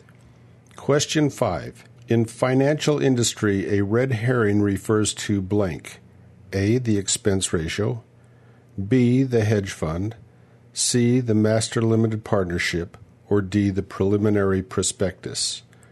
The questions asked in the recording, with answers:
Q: In financial industry, a red herring refers to blank.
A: And the answer is D. The preliminary prospectus.